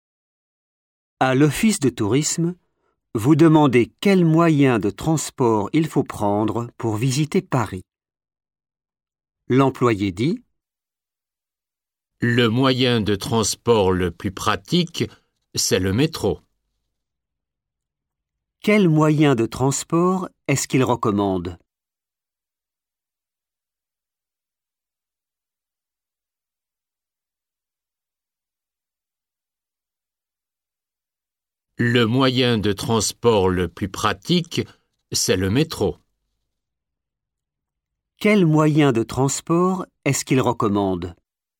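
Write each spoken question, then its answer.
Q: Quel moyen de transport est-ce qu'il recommande?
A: le métro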